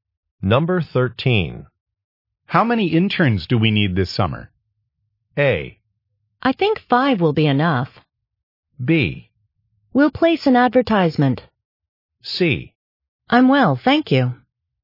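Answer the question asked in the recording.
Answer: A: I think 5 will be enough.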